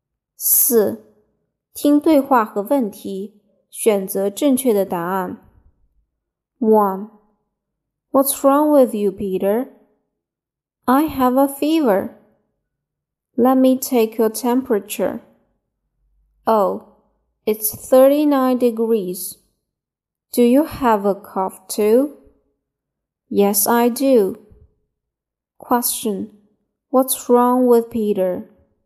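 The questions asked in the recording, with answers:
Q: What's wrong with Peter?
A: He has a fever and a cough.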